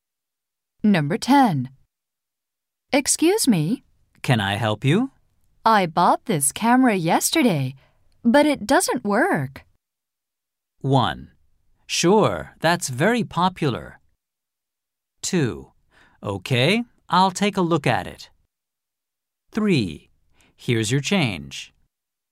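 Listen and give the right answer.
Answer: 2: Okay, I'll take a look at it.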